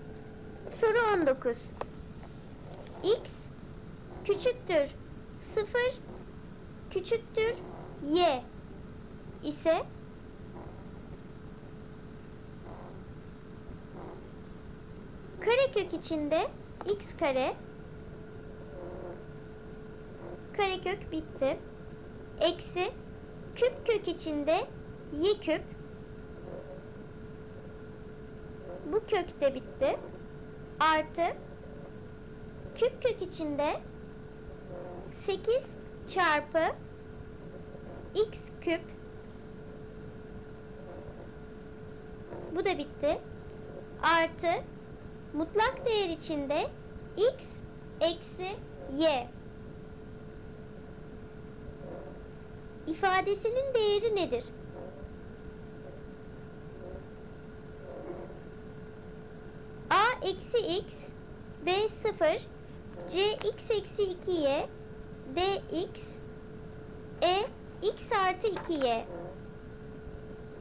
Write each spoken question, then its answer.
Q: İfadesinin değeri nedir?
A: Doğru cevap b 0.